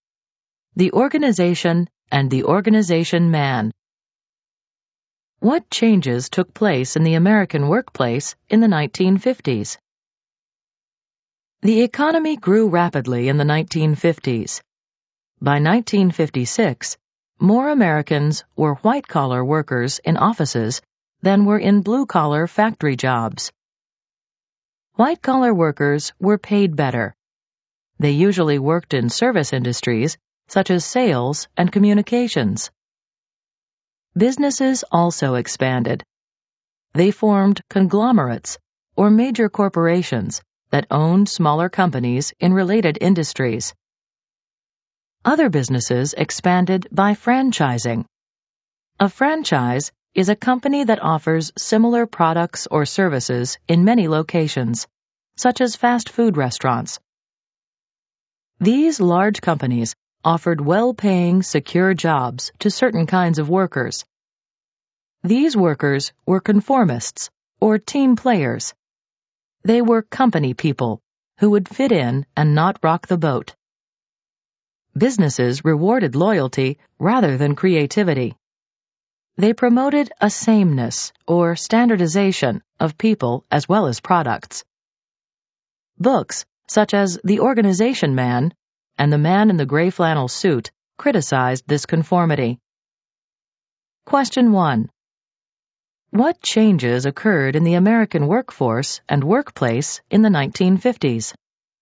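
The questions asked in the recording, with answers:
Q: What changes occurred in the American workforce and workplace in the 1950s?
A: More Americans held white-collar office jobs than factory jobs, businesses grew through conglomerates and franchising, and companies rewarded conformity and loyalty over creativity.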